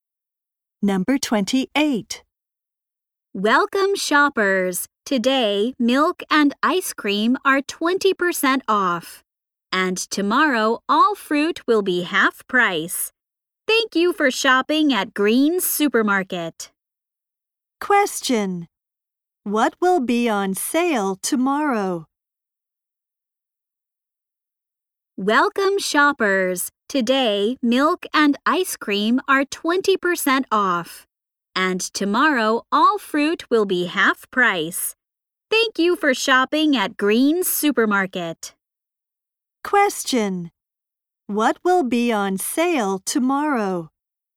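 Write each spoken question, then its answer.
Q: What will be on sale tomorrow?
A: Fruit.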